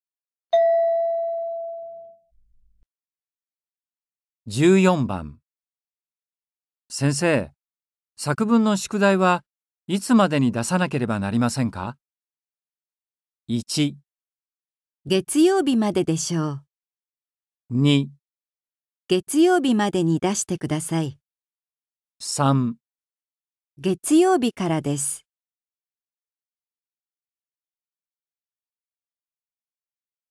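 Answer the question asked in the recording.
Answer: 月曜日までに出してください。

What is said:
M:先生、作文の宿題はいつまでに出さなければなりませんか。

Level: N4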